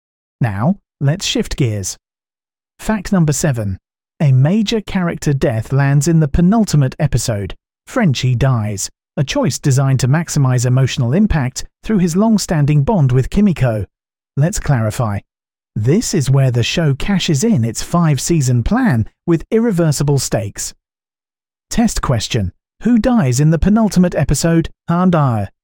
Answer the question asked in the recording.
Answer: Frenchie.